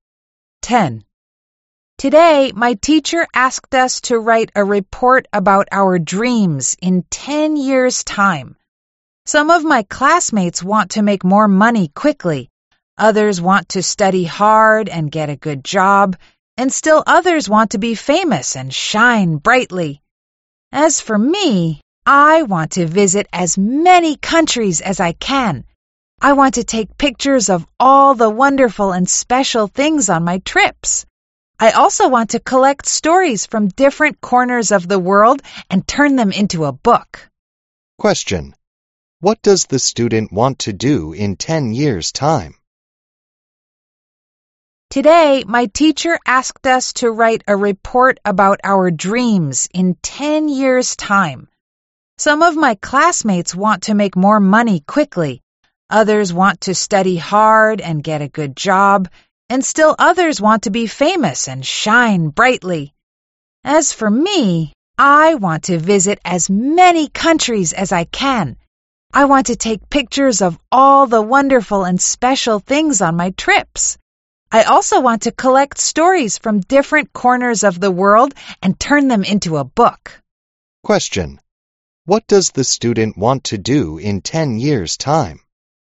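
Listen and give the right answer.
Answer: Visit many countries, take pictures, and turn stories collected into a book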